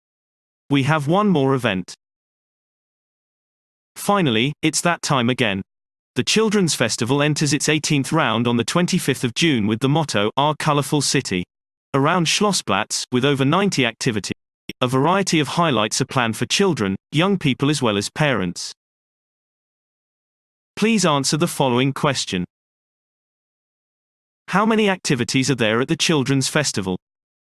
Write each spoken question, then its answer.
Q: How many activities are there at the Children's Festival?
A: There are over 90 activities at the Children's Festival.